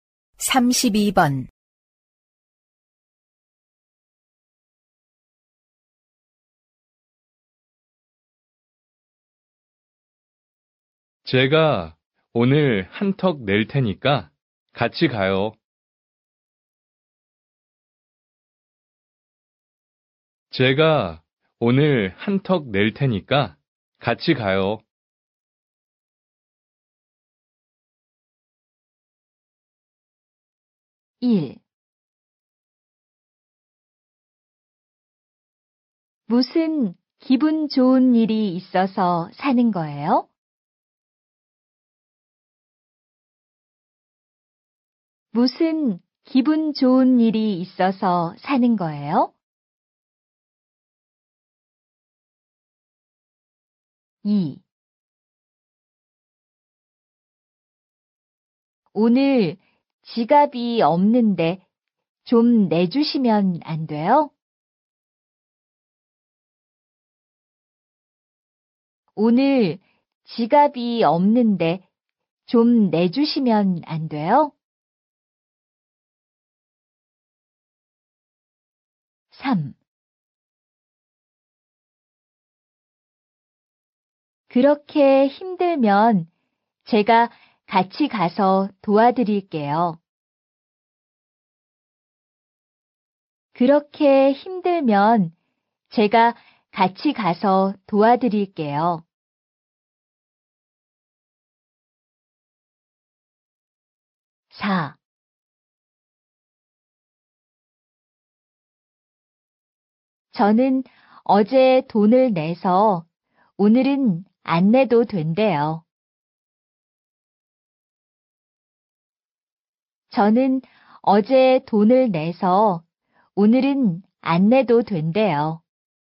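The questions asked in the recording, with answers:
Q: 제가 오늘 한턱 낼 테니까 같이 가요.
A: 1: 무슨 기분 좋은 일이 있어서 사는 거예요?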